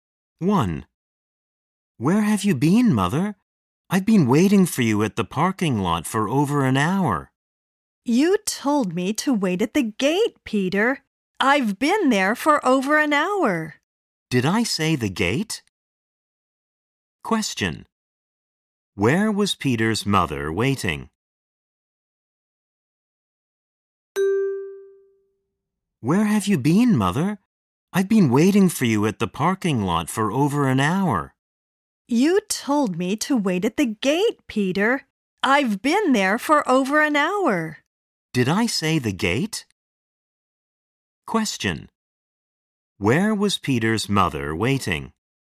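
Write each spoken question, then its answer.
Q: Where was Peter's mother waiting?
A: At the gate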